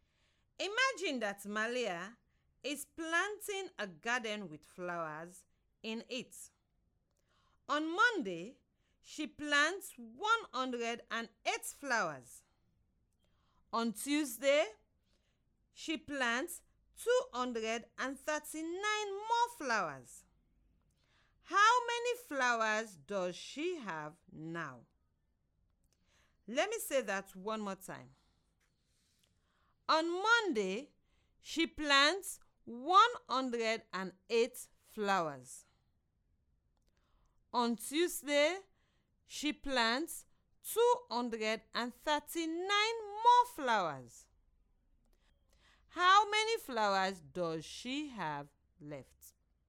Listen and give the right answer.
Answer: This means that she has 347 flowers in total after 2 days of planting.